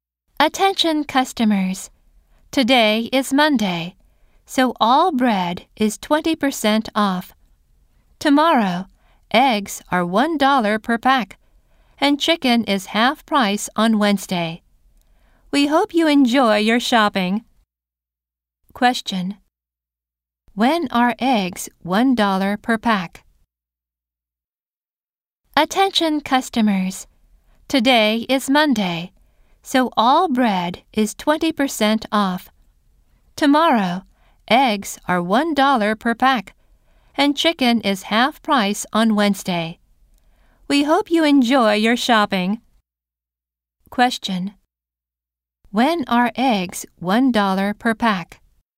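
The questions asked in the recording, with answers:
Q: When are eggs $1 per pack?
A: On Tuesday (tomorrow)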